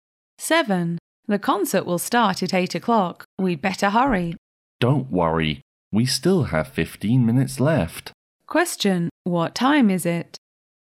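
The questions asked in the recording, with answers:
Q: What time is it?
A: 7:45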